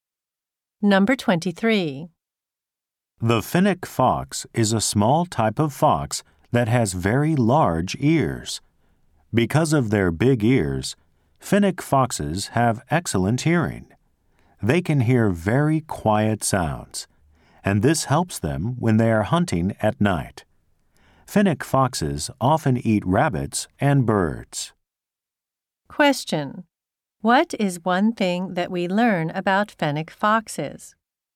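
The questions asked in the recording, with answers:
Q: What is one thing that we learn about fennec foxes?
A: They have excellent hearing because of their big ears.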